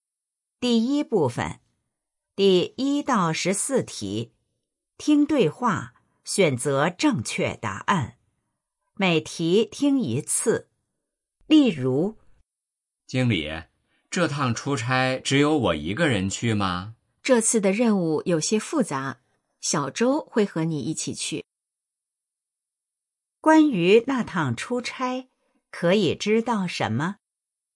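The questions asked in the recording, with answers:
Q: 关于那趟出差,可以知道什么?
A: 小周会和他一起去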